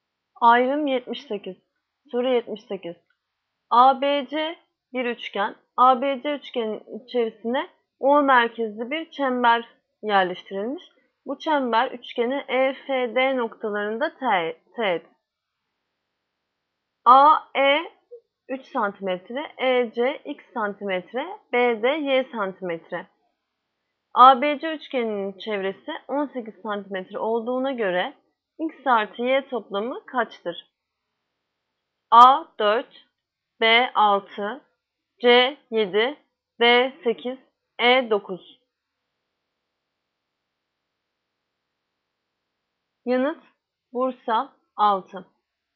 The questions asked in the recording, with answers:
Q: ABC üçgeninin çevresi 18 cm olduğuna göre x artı y toplamı kaçtır?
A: Yanıt Bursa 6.